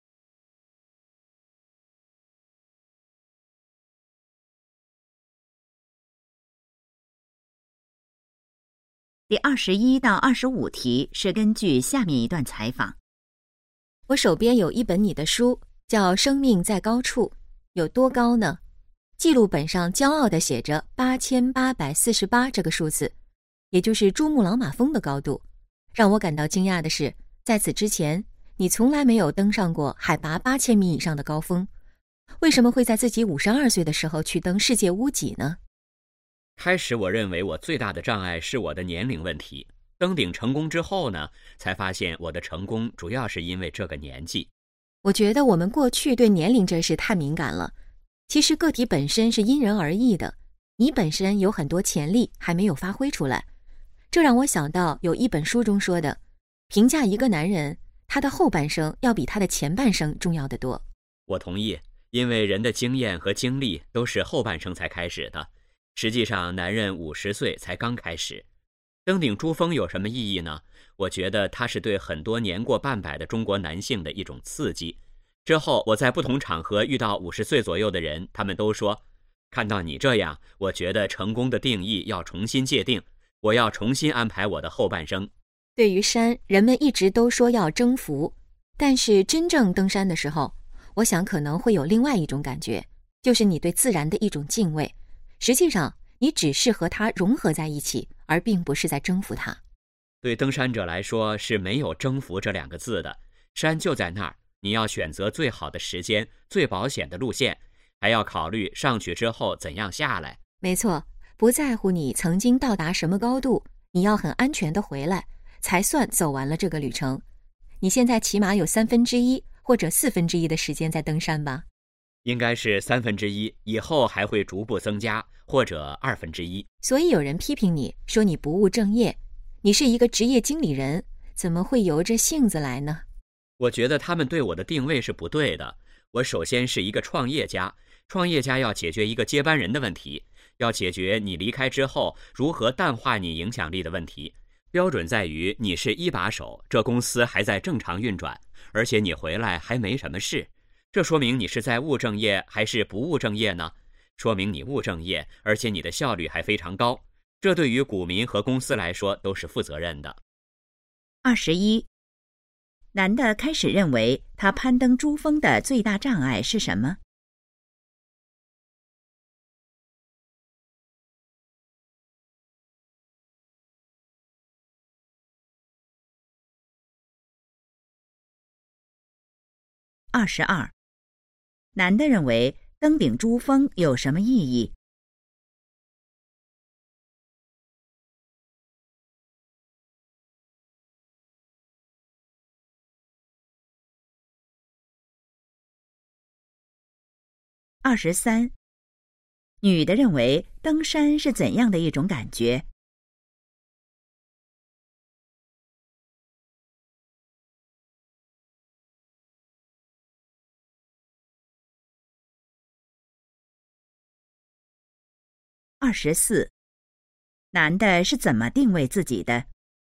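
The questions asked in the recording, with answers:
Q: 男的开始认为他攀登珠峰的最大障碍是什么?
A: 年龄

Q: 男的认为登顶珠峰有什么意义?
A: 对年过半百的中国男性是一种刺激

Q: 女的认为登山是怎样的一种感觉?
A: 对自然的敬畏,与山融合而不是征服

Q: 男的是怎么定位自己的?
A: 创业家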